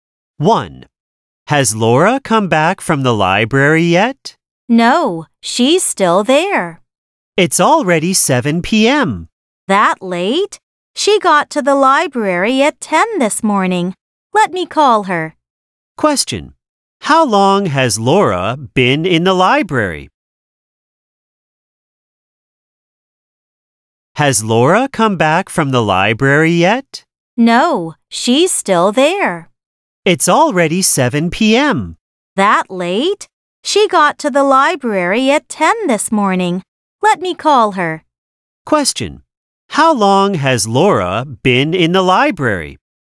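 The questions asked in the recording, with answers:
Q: How long has Laura been in the library?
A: Nine hours (since 10 a.m., now 7 p.m.)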